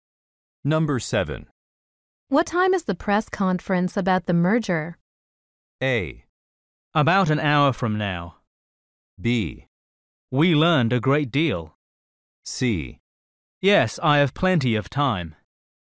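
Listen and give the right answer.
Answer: A: About an hour from now.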